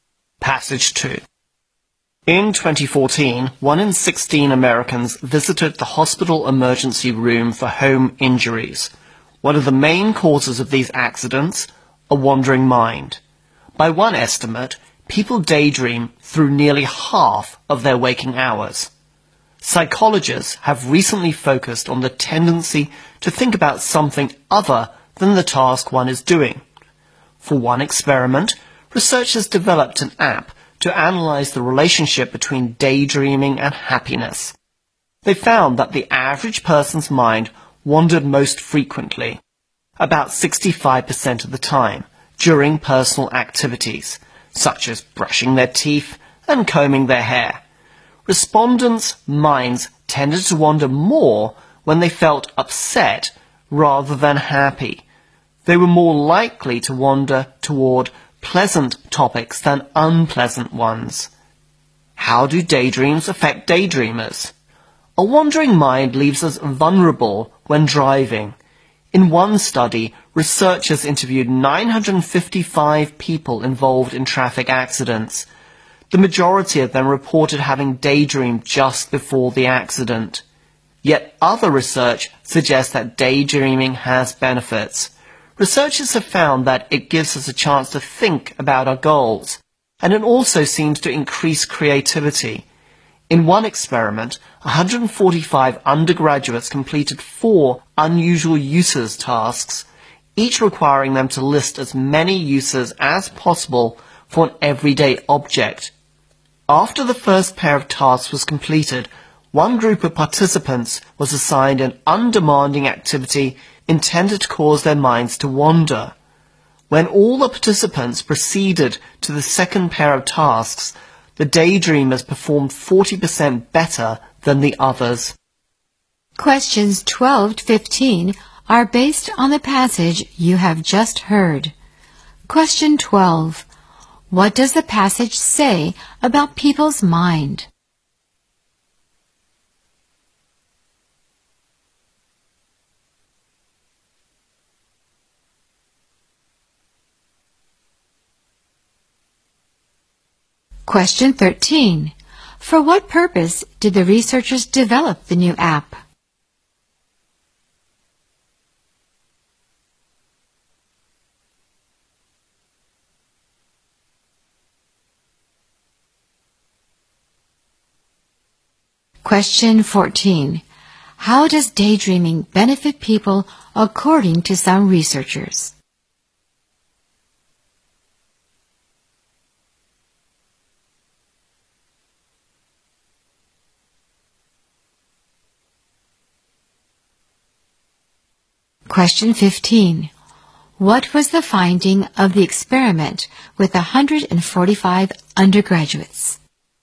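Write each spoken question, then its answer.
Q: What does the passage say about people's mind?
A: People daydream through nearly half of their waking hours

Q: For what purpose did the researchers develop the new app?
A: To analyze the relationship between daydreaming and happiness

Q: How does daydreaming benefit people according to some researchers?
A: It lets us think about our goals and increases creativity

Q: What was the finding of the experiment with 145 undergraduates?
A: The daydreamers performed 40% better on the second tasks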